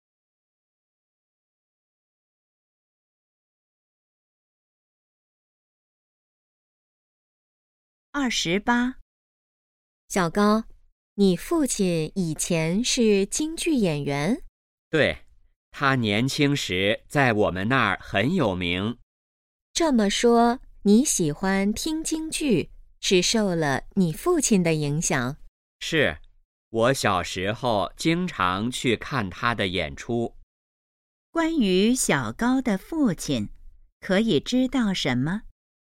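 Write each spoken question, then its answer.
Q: 关于小高的父亲,可以知道什么?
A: 以前是京剧演员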